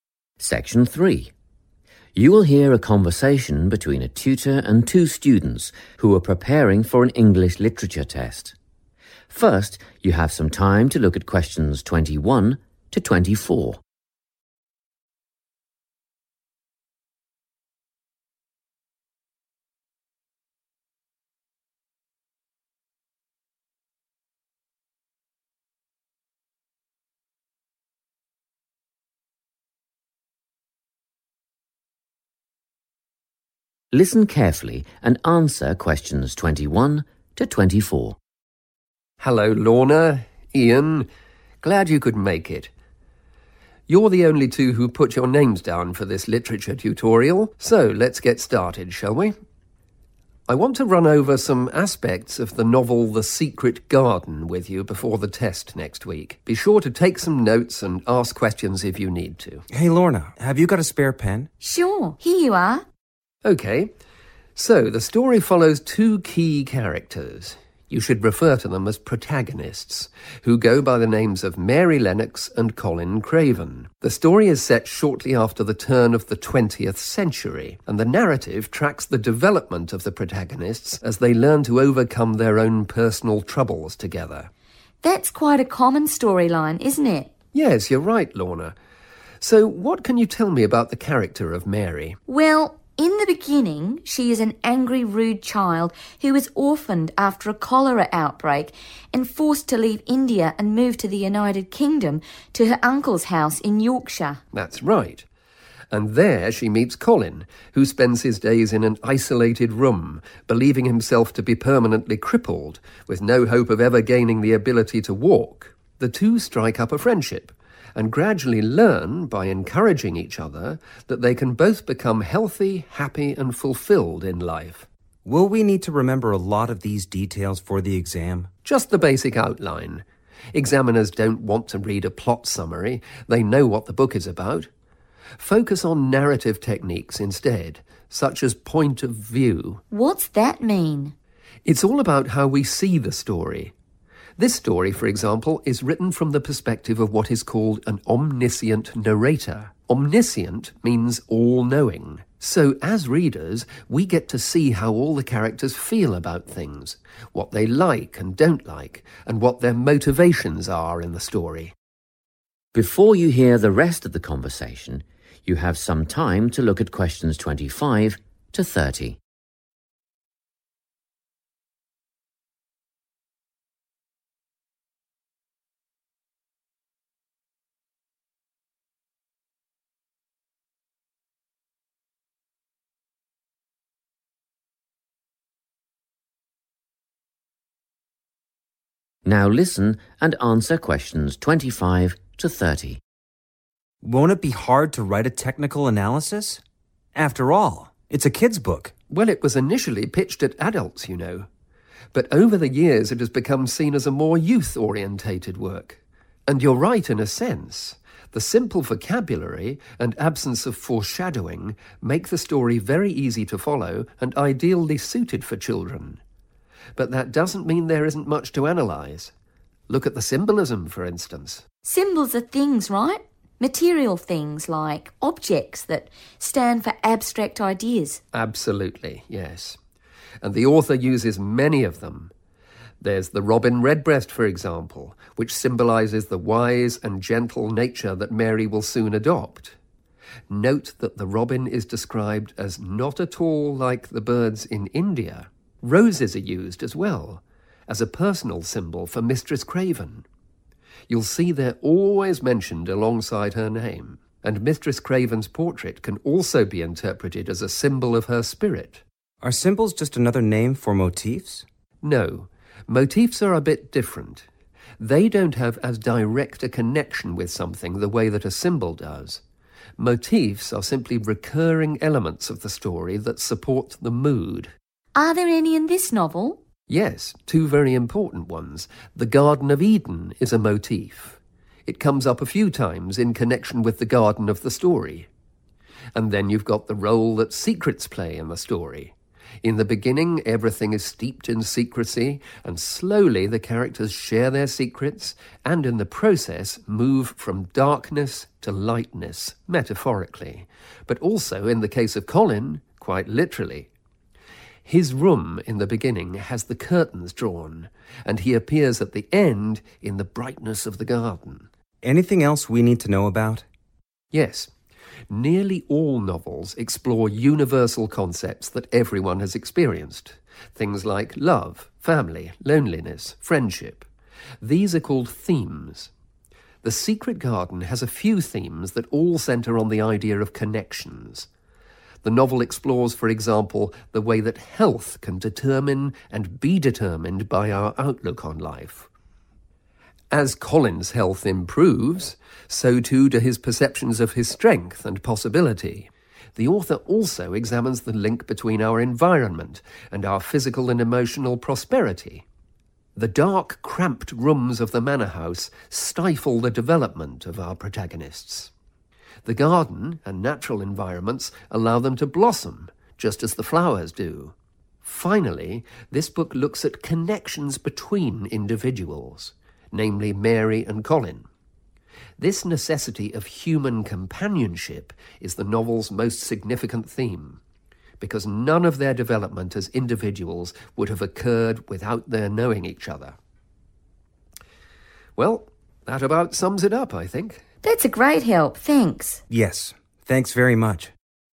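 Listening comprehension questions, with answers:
Complete the notes below. Write NO MORE THAN THREE WORDS for each answer.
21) Novel: 21.................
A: The Secret Garden

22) Time period: Early in 22...............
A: 20th century

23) Plot: Mary > UK – meets Colin who thinks he'll never be able to 23............... .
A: walk

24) Point of view: "Omniscient" – narrator knows all about characters' feelings, opinions and 24.................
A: motivations

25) Symbols (physical items that represent 25.............. ):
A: abstract ideas

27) - secrecy – metaphorical and literal transition from 27...............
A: darkness to lightness

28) - 28................ and outlook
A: health

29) - 29.................. and well-being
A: environment

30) - individuals and the need for 30.................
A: human companionship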